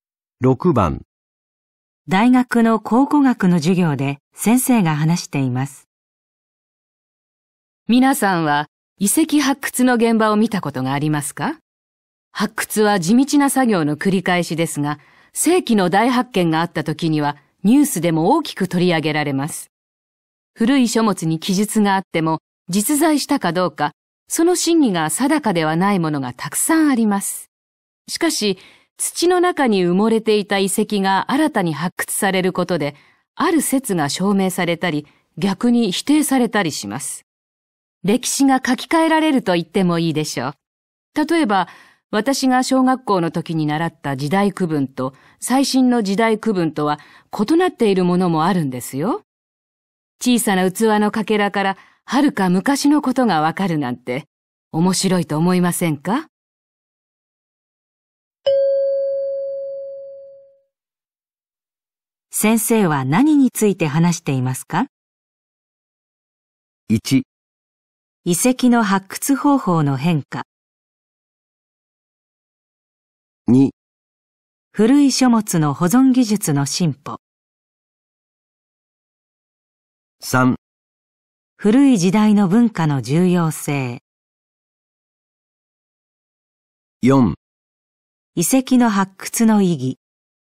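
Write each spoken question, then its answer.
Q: 先生は何について話していますか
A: 4: 遺跡の発掘の意義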